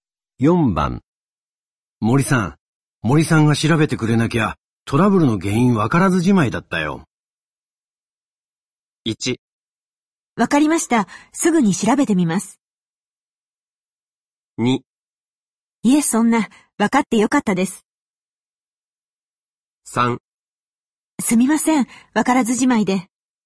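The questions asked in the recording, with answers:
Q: 森さん、森さんが調べてくれなきゃ、トラブルの原因わからずじ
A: 2: いえ、そんな、わかってよかったです。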